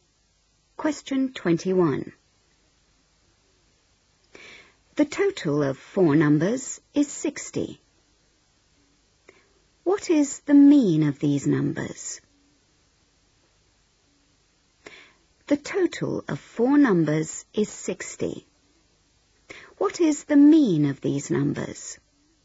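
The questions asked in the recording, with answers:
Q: What is the mean of these numbers?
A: 15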